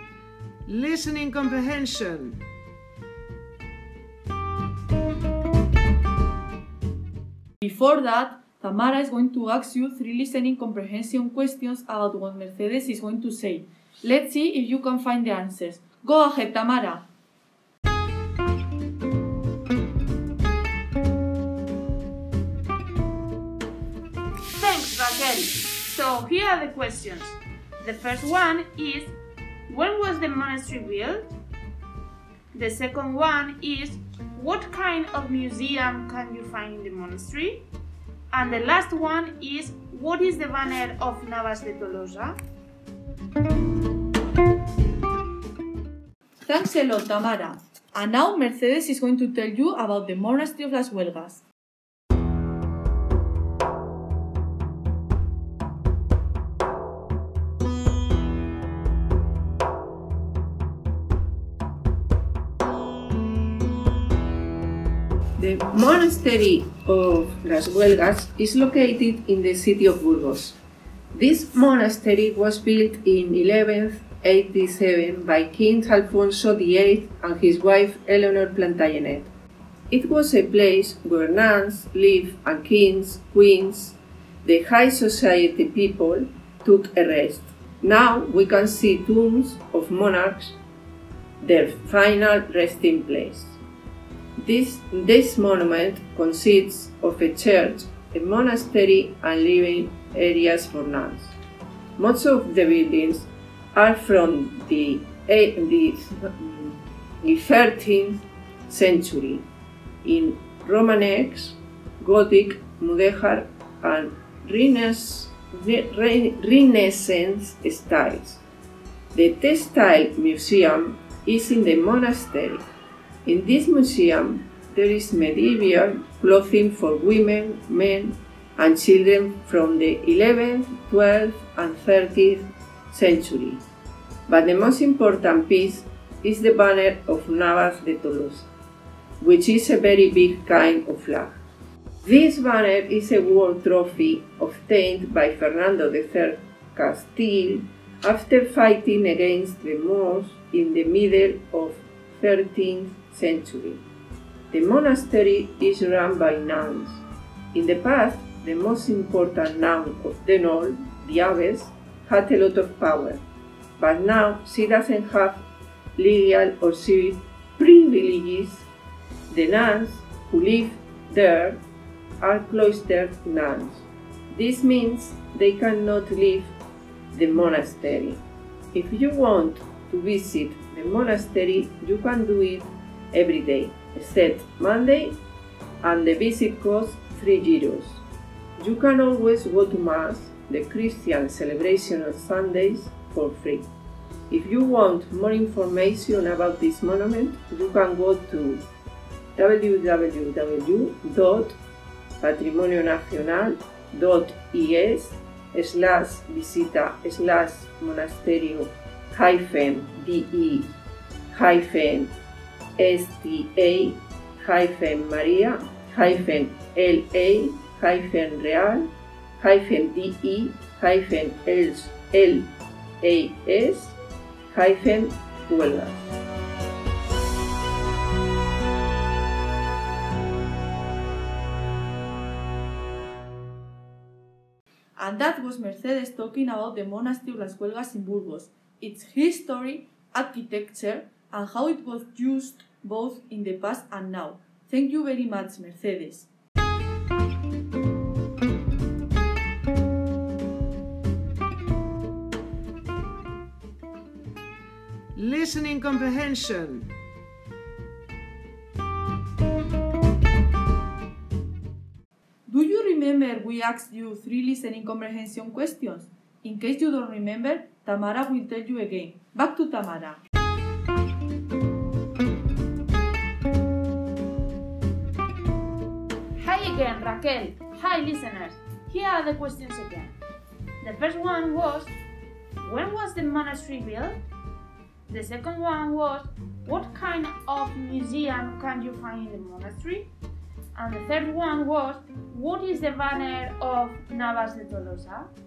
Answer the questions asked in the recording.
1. The monastery of Las Huelgas was built in 1187.
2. The museum you can find there is a textile museum
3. the banner of Navas de Tolosa is a war trophy obtained by Fernando III of Castile after fighting against the Moors in the middle of the 13th century.